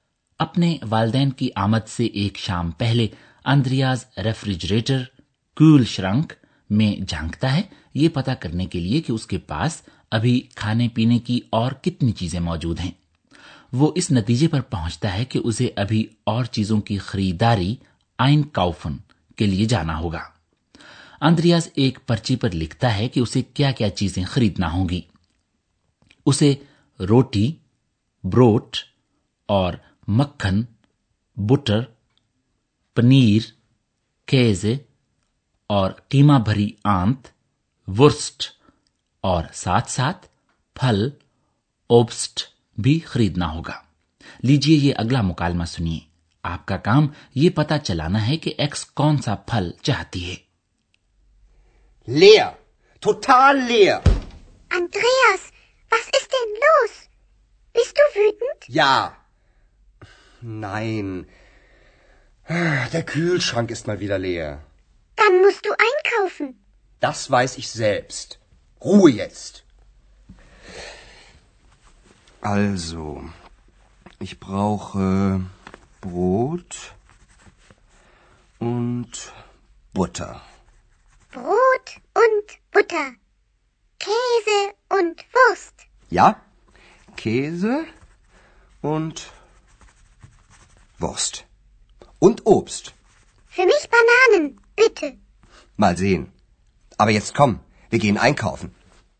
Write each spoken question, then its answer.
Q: آپ کا کام یہ پتا چلانا ہے کہ x کون سا پھل چاہتی ہے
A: جی تو x خواہش کرتی ہے کیلوں کی